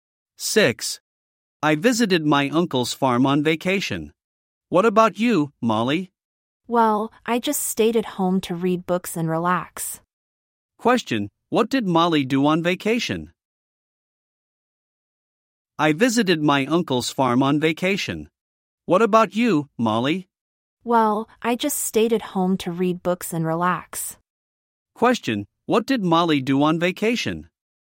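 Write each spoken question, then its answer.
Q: Question, what did Molly do on vacation?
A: She stayed at home to read books and relax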